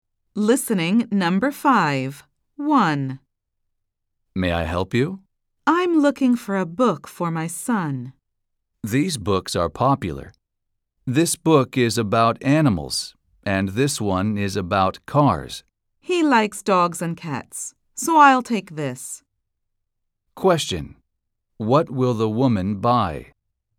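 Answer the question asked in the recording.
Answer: a book about animals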